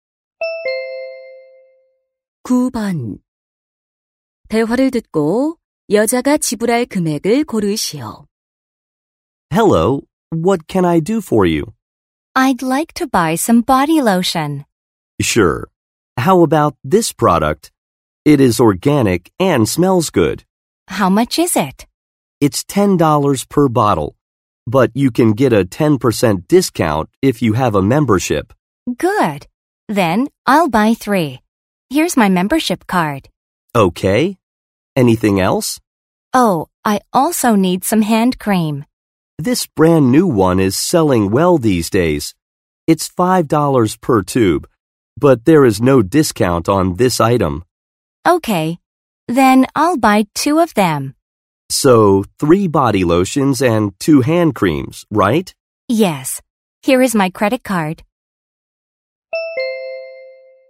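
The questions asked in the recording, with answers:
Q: 대화를 듣고 여자가 지불할 금액을 고르시오.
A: $37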